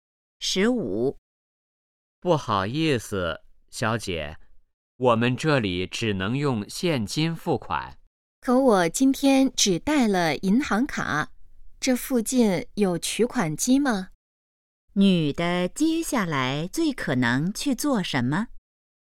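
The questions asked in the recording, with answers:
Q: 女的接下来最可能去做什么?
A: 去取款机取钱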